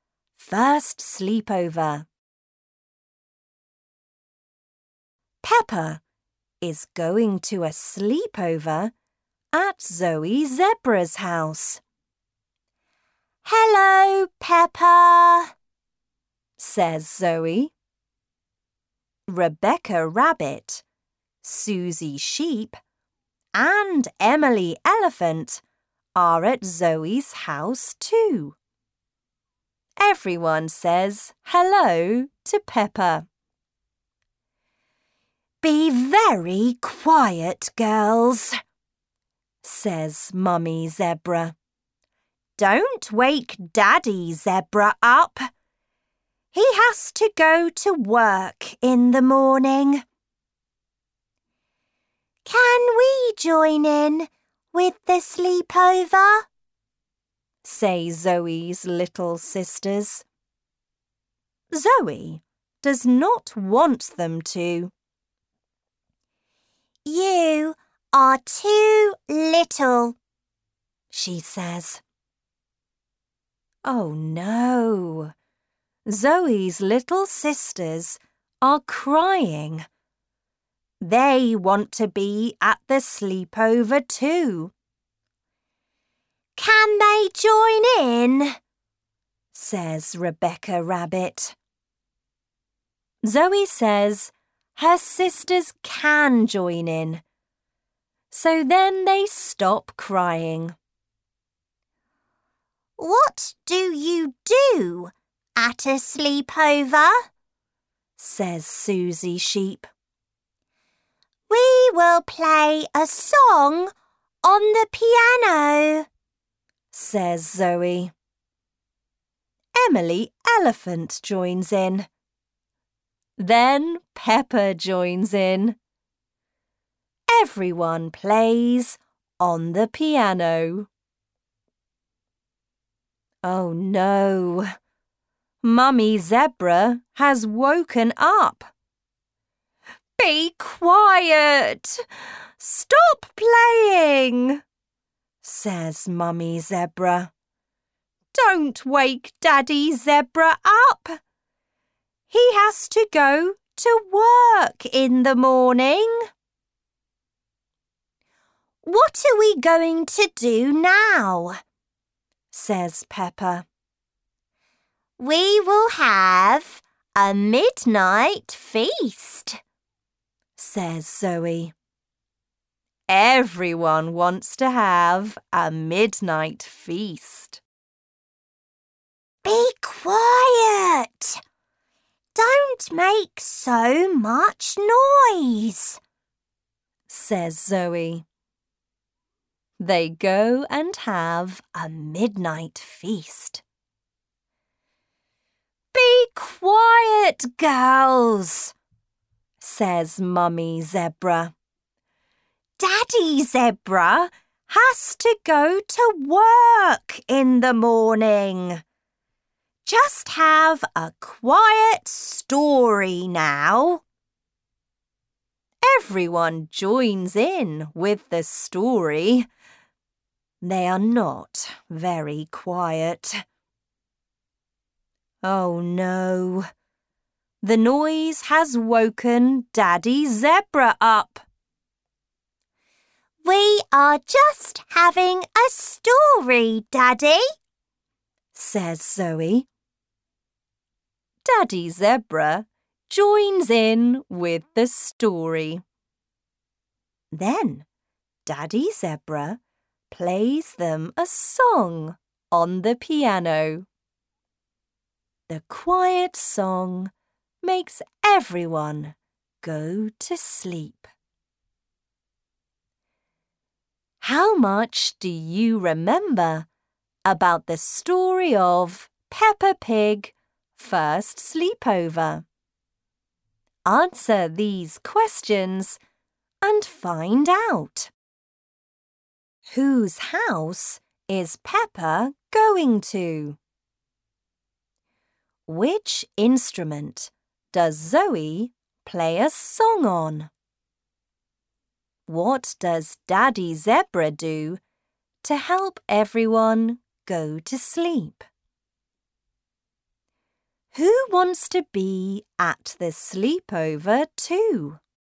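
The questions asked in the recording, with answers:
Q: Whose house is Peppa going to?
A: Zoe Zebra's house

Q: Which instrument does Zoe play a song on?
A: The piano

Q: What does Daddy Zebra do to help everyone go to sleep?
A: He plays them a quiet song on the piano

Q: Who wants to be at the sleepover too?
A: Zoe's little sisters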